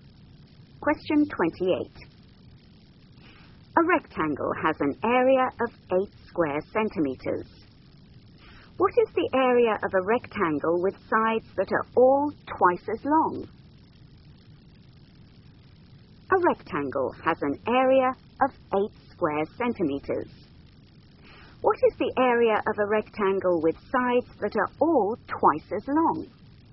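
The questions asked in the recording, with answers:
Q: What is the area of a rectangle with sides that are all twice as long?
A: 32 square centimeters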